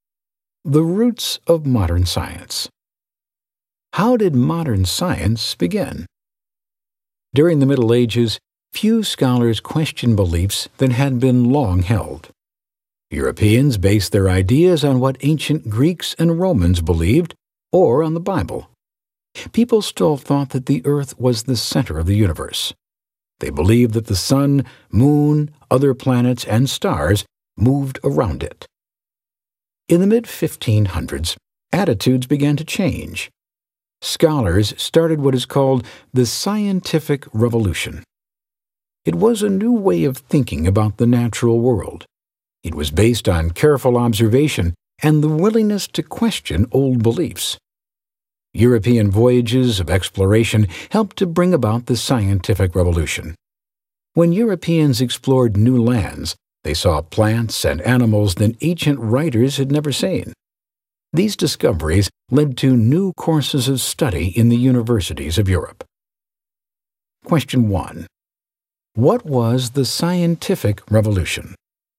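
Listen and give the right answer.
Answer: A new way of thinking about the natural world, based on careful observation and questioning old beliefs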